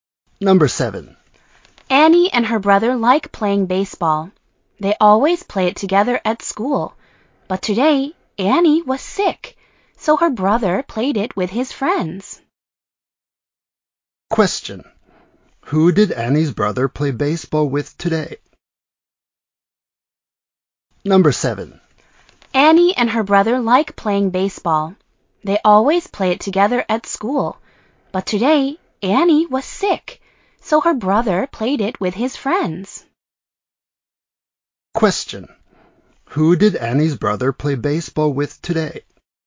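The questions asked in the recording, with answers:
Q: Who did Annie's brother play baseball with today?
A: With his friends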